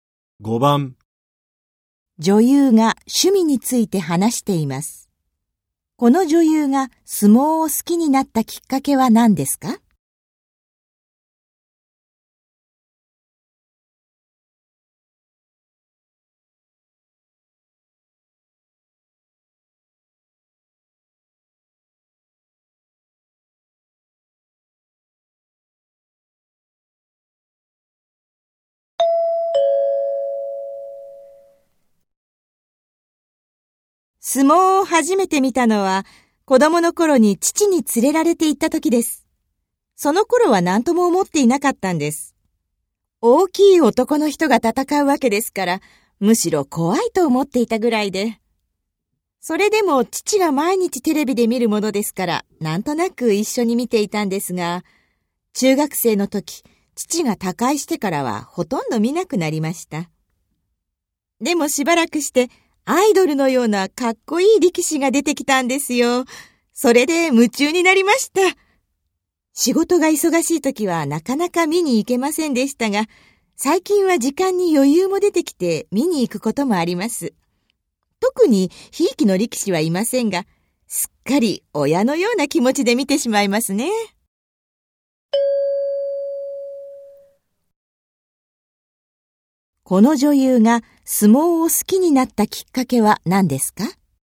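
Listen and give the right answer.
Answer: アイドルのようなかっこいい力士が出てきたこと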